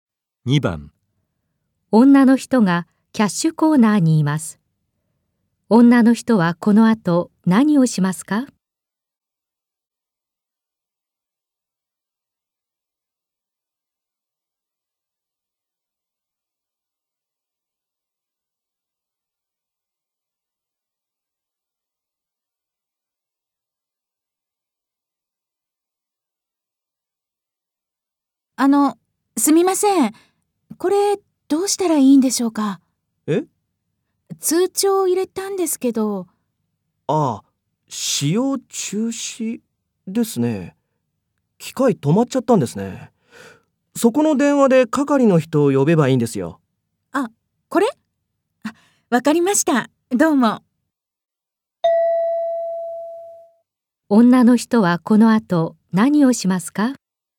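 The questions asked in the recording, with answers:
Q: 女の人はこの後何をしますか?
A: そこの電話で係の人を呼ぶ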